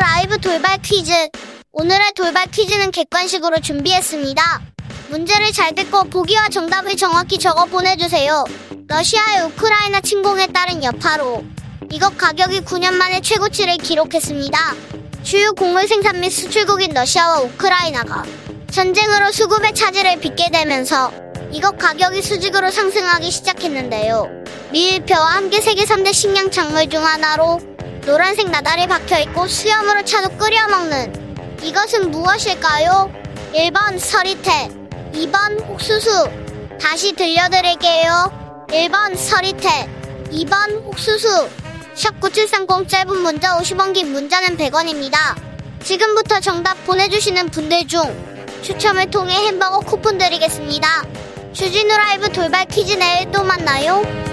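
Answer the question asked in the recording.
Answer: 2번: 옥수수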